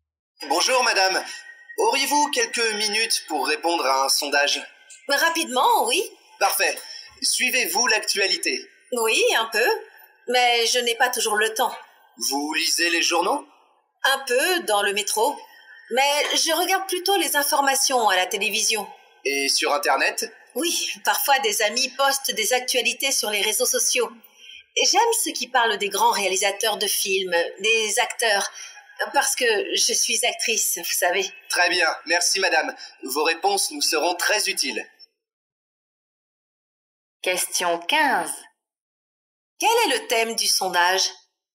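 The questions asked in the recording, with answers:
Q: Quel est le thème du sondage ?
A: L'actualité / les médias d'information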